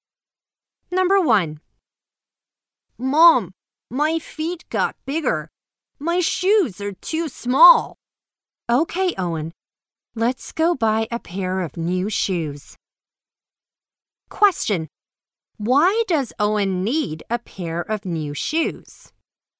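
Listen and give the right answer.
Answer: His feet got bigger and his shoes are too small.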